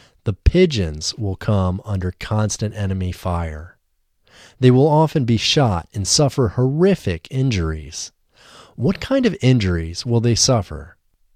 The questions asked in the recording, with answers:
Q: What kind of injuries will they suffer?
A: They will suffer horrific injuries.